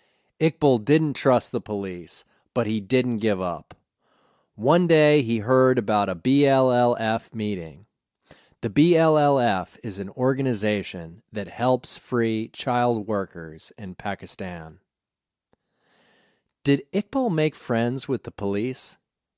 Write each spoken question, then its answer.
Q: Did Iqbal make friends with the police?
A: No, he didn't make friends with the police.